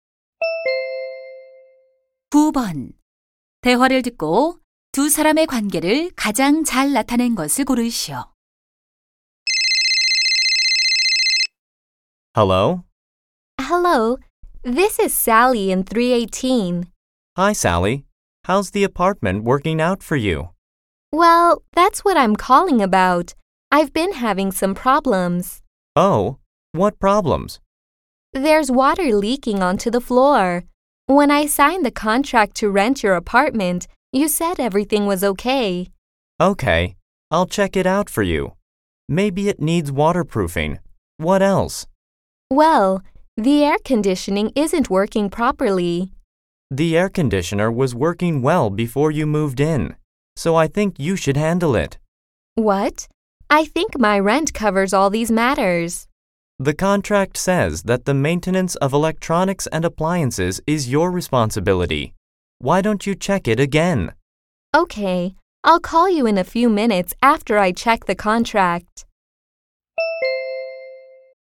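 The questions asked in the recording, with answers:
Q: 대화를 듣고 두 사람의 관계를 가장 잘 나타낸 것을 고르시오.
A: 세입자 - 집주인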